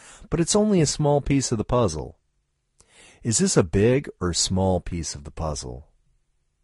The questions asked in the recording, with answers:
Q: Is this a big or small piece of the puzzle?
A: This is a small piece of the puzzle.